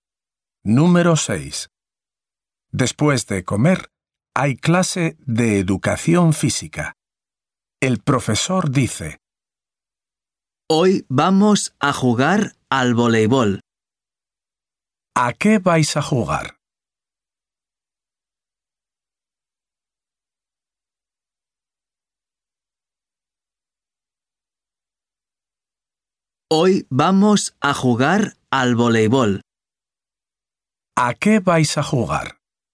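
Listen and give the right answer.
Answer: Al voleibol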